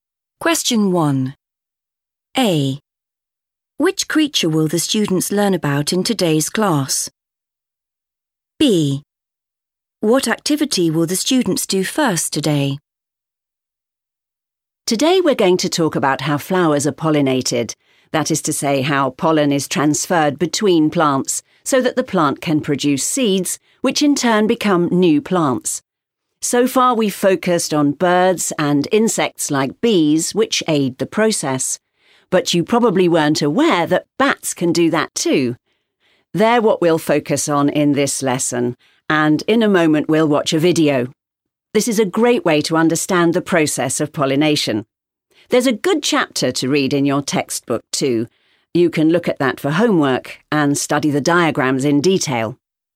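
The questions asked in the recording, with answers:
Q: Which creature will the students learn about in today's class?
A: bats

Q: What activity will the students do first today?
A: watch a video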